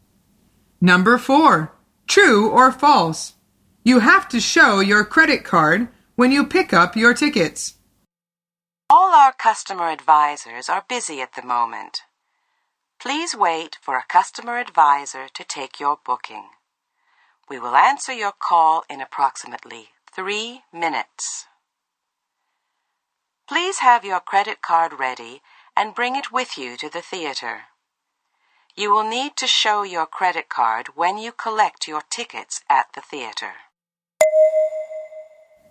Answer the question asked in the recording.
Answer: The answer is true. The woman says, you will need to show your credit card when you collect your tickets at the theater.